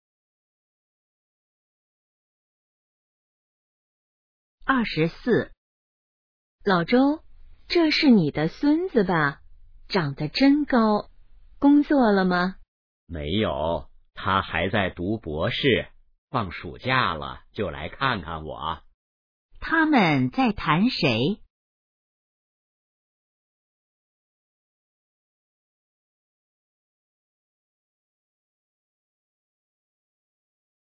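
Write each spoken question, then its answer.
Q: 他们在谈谁?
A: 老周的孙子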